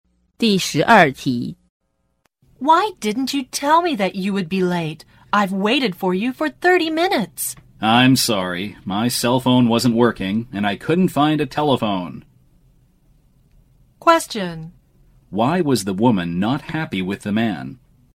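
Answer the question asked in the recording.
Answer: He was 30 minutes late and didn't tell her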